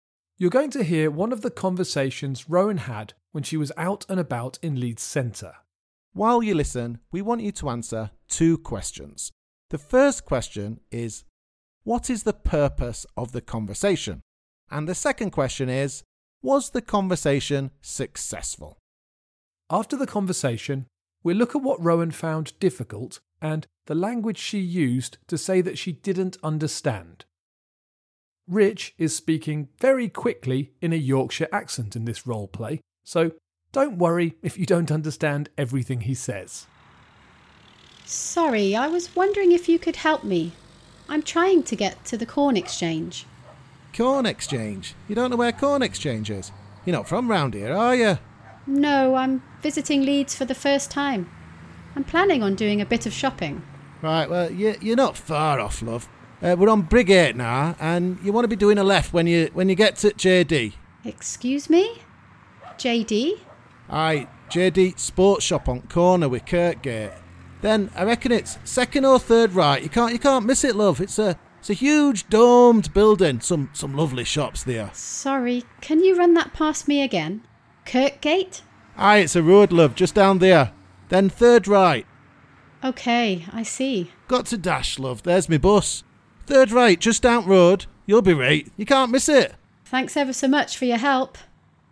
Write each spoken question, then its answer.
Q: The first question is, what is the purpose of the conversation?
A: Okay, the purpose of the conversation was to ask for directions.